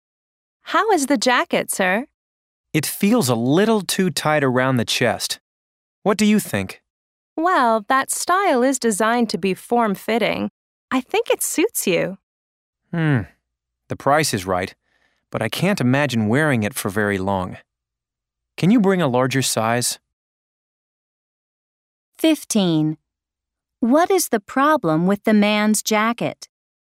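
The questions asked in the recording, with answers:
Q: What is the problem with the man's jacket?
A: It is too tight around the chest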